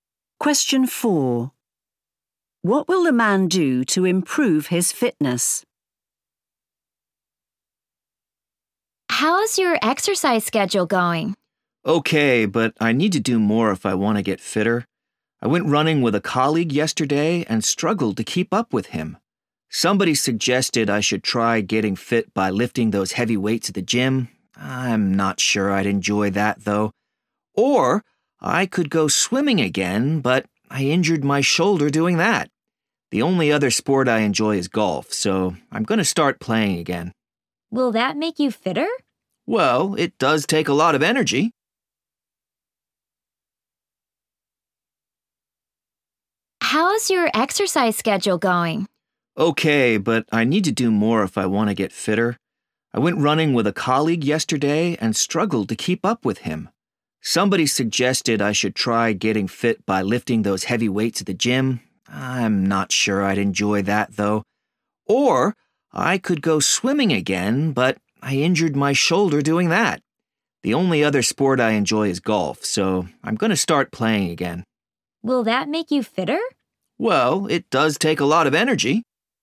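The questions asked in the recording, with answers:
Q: What will the man do to improve his fitness?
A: start playing golf again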